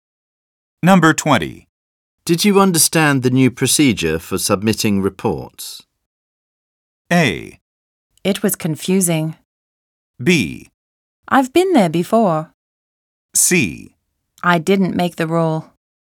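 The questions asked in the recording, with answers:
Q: Did you understand the new procedure for submitting reports?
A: A: It was confusing.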